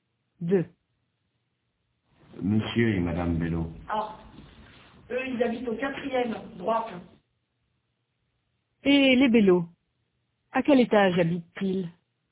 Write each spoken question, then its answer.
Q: Et les Bello, à quel étage habitent-ils?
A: Au 4e étage.